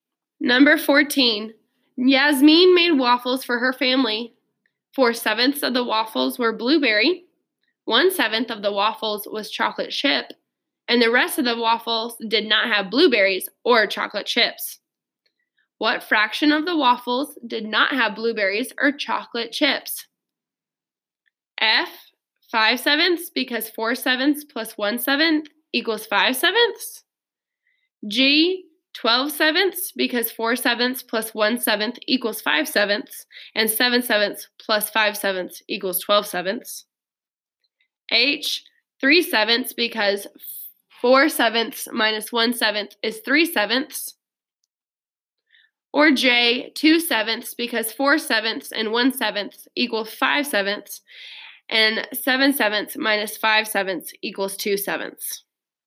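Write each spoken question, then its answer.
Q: What fraction of the waffles did not have blueberries or chocolate chips?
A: J: 2 sevenths, because 4 sevenths and 1 seventh equal 5 sevenths, and 7 sevenths minus 5 sevenths equals 2 sevenths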